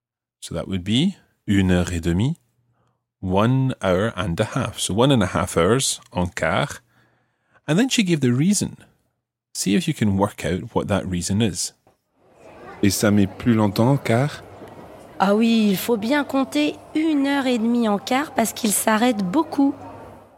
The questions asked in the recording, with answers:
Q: See if you can work out what that reason is.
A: The coach stops a lot. It stops often.